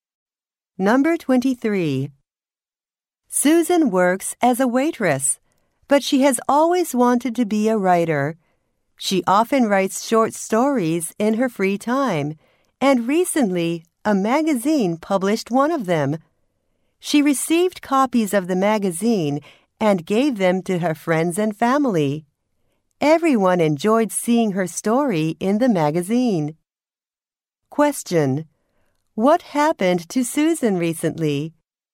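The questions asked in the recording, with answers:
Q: What happened to Susan recently?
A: A magazine published one of her stories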